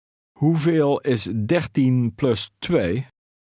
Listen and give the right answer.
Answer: 15.